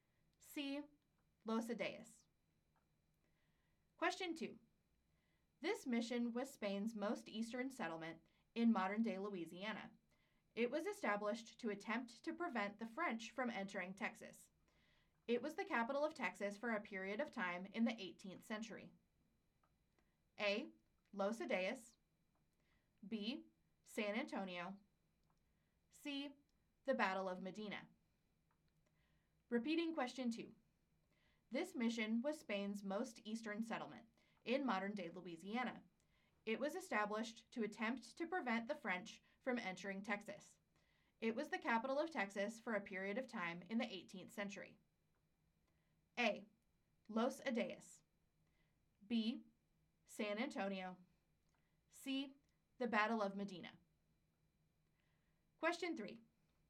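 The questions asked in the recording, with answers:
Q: This mission was Spain's most eastern settlement in modern-day Louisiana.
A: A: Los Adeas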